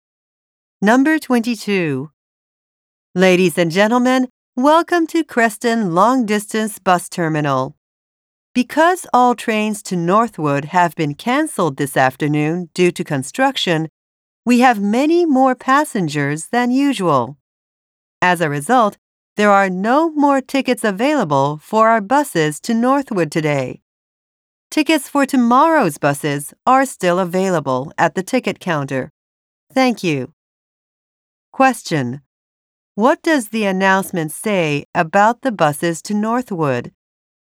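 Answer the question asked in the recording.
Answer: There are no more tickets for today's buses.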